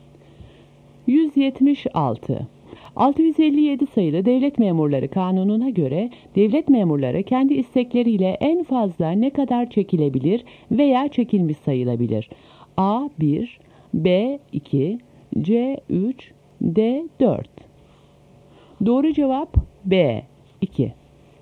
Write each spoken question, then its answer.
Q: 657 sayılı Devlet Memurları Kanunu'na göre devlet memurları kendi istekleriyle en fazla ne kadar çekilebilir veya çekilmiş sayılabilir?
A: Doğru cevap B 2.